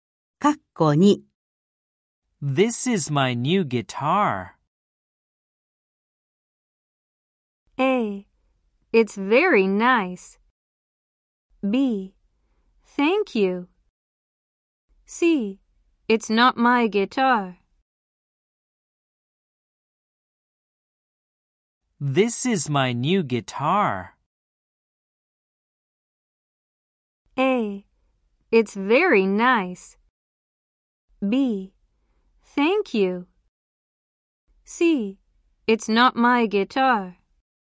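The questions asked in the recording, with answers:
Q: This is my new guitar.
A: A: It's very nice.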